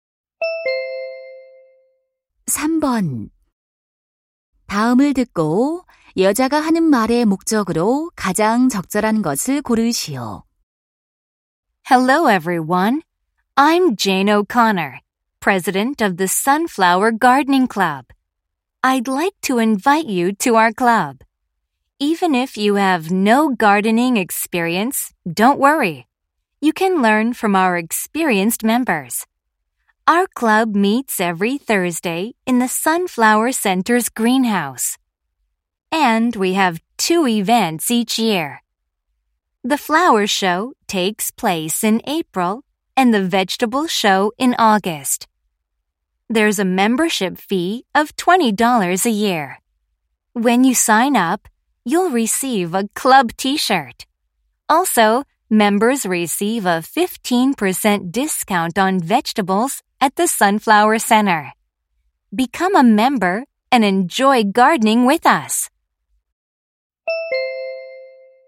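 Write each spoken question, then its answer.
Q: 다음을 듣고 여자가 하는 말의 목적으로 가장 적절한 것을 고르시오.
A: 원예 동호회 가입을 권유하려고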